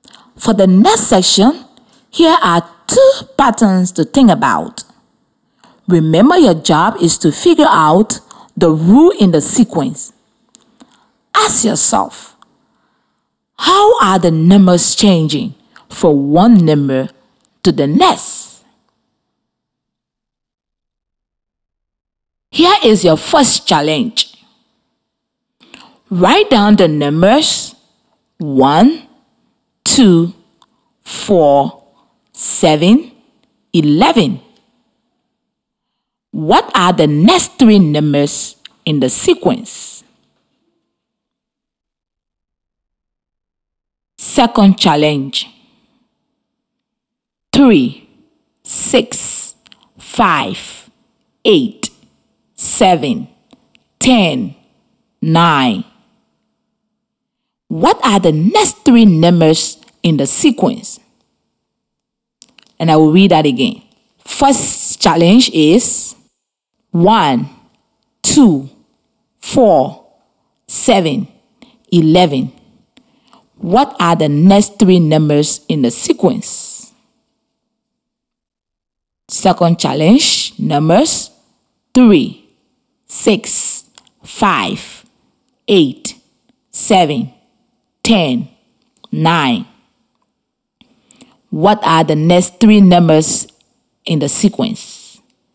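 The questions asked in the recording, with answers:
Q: What are the next three numbers in the sequence?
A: 16, 22, 29

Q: 3, 6, 5, 8, 7, 10, 9 what are the next three numbers in the sequence?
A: 12, 11, 14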